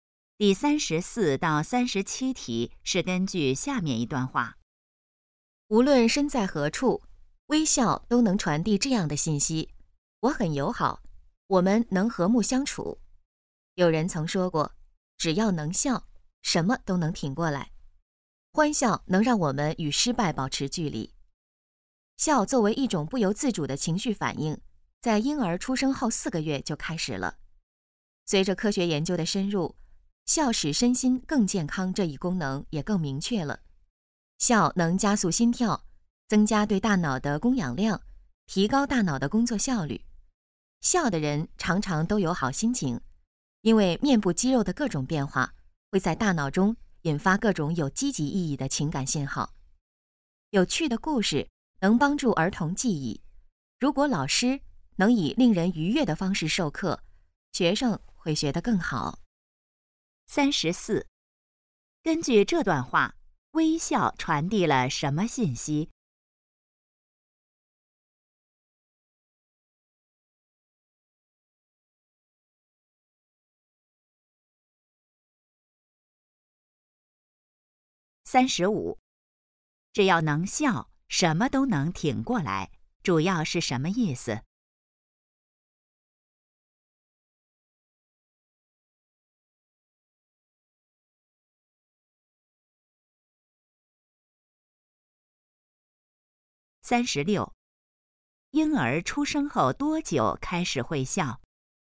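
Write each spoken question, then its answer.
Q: 根据这段话,微笑传递了什么信息?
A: 我很友好,我们能和睦相处

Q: 婴儿出生后多久开始会笑?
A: 4个月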